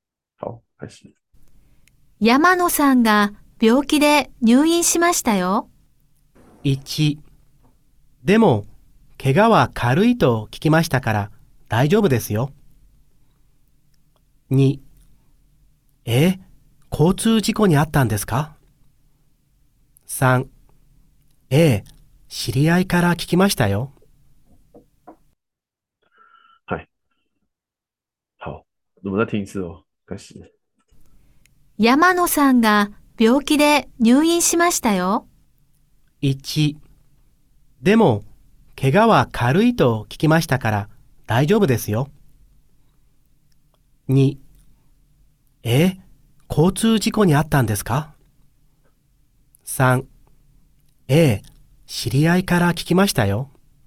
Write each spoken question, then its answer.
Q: 山野さんが病気で入院しましたよ。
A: 答案是三番です。